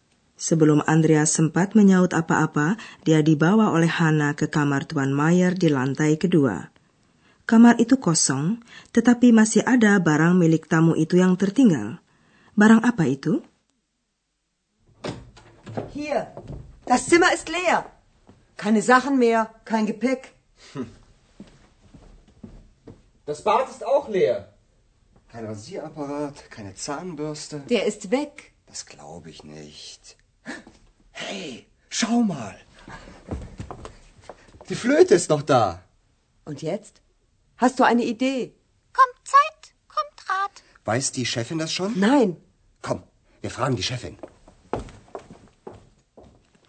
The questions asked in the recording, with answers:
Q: Barang apa itu?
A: Satu-satunya barang yang tertinggal di kamar kosong itu adalah seruling Tuan Mayer.